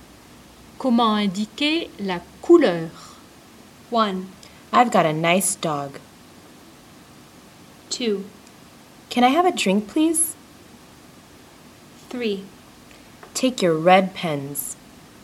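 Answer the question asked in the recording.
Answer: 3: Take your red pens.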